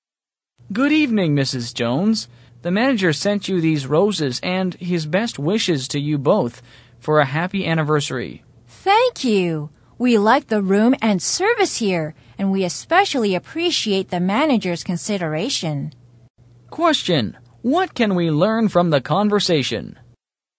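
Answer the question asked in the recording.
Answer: Mrs. Jones and her husband are celebrating their anniversary at a hotel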